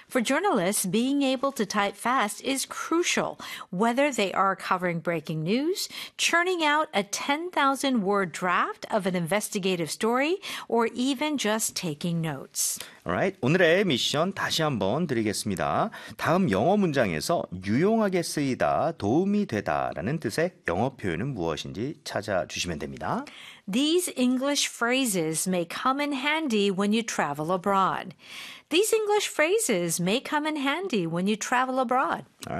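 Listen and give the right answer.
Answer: come in handy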